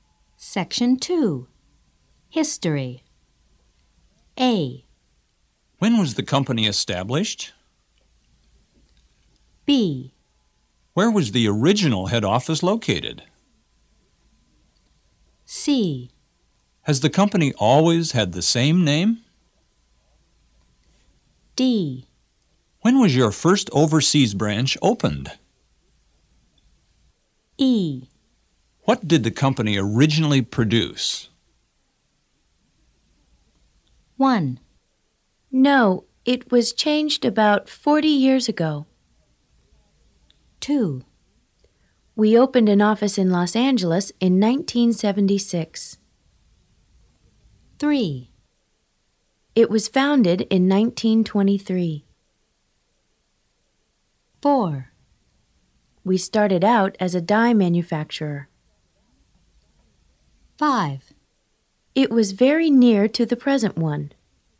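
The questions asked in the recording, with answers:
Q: No, it was changed about 40 years ago.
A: C: Has the company always had the same name?

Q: We opened an office in Los Angeles in 1976.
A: D: When was your first overseas branch opened?

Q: It was founded in 1923.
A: A: When was the company established?

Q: We started out as a dye manufacturer.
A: E: What did the company originally produce?

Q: It was very near to the present one.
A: B: Where was the original head office located?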